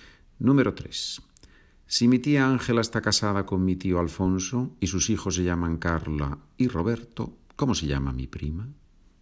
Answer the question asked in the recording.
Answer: Mi prima se llama Carla.